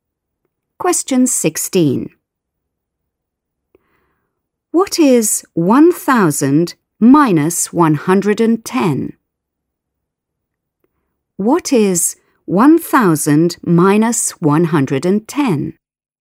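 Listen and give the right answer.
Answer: 890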